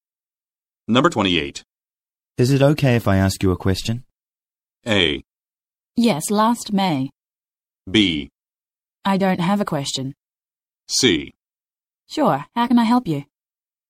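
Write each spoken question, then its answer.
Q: Is it okay if I ask you a question?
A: C: Sure, how can I help you?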